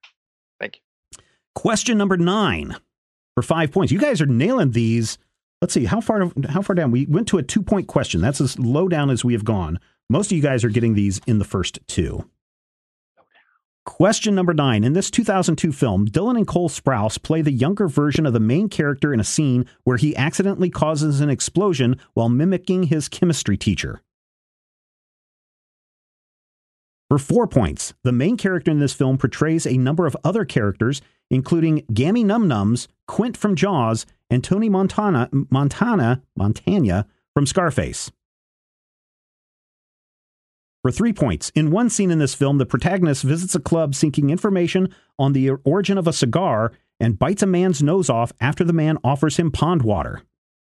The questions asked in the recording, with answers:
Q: In this 2002 film, Dylan and Cole Sprouse play the younger version of the main character in a scene where he accidentally causes an explosion while mimicking his chemistry teacher.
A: That is correct. Master of Disguise.